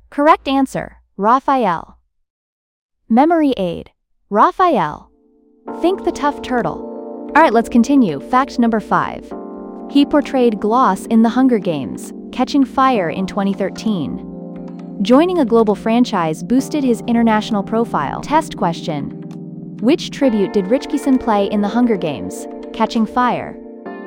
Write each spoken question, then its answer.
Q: which tribute did Ritchison play in The Hunger Games: Catching Fire?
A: Gloss.